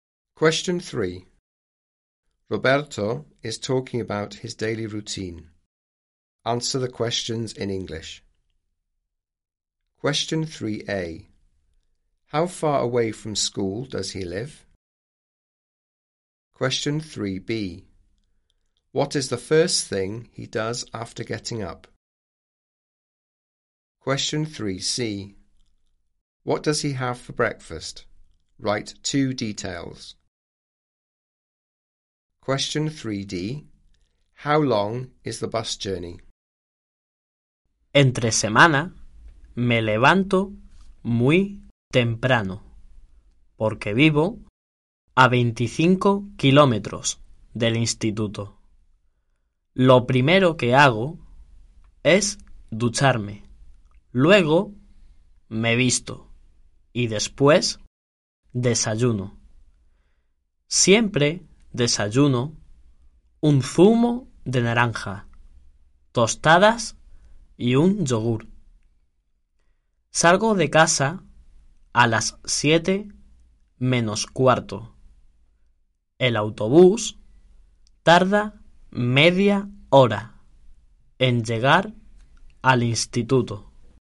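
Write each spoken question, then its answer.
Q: How far away from school does he live?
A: 25 kilometres

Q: What is the first thing he does after getting up?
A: He has a shower

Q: What does he have for breakfast?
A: Orange juice, toast and a yoghurt (any two)

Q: How long is the bus journey?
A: Half an hour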